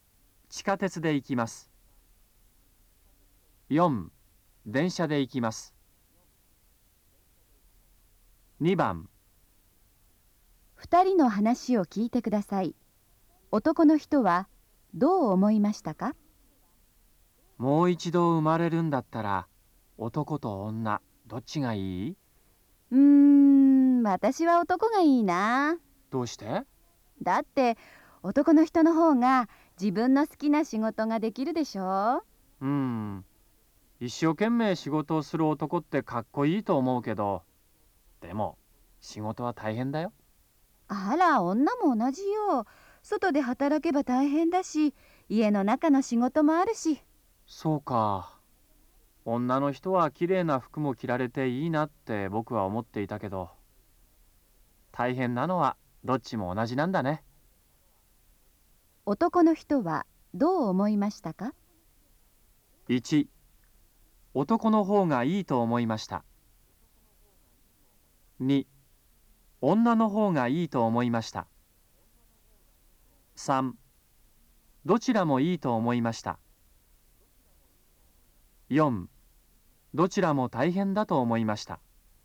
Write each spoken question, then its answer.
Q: 男の人はどう思いましたか?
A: 2番、4